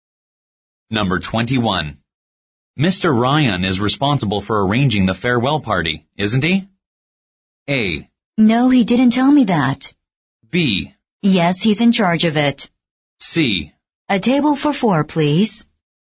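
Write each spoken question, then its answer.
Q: Mr. Ryan is responsible for arranging the farewell party, isn't he?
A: B: Yes, he's in charge of it.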